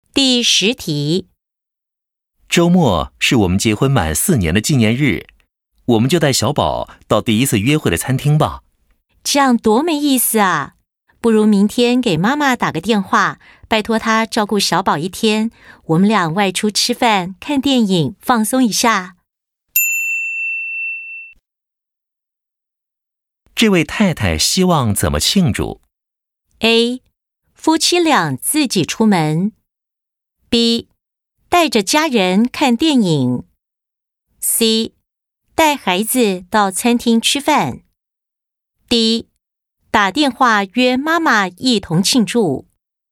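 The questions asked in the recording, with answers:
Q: 这位太太希望怎么庆祝?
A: A: 夫妻俩自己出门。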